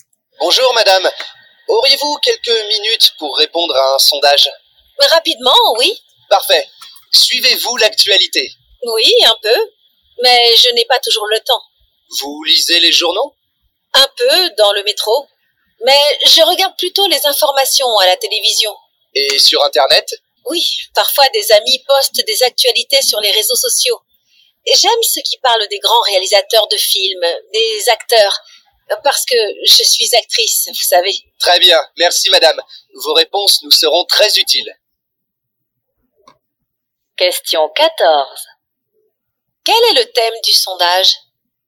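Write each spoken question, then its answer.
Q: Quel est le thème du sondage ?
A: L'actualité / la façon de s'informer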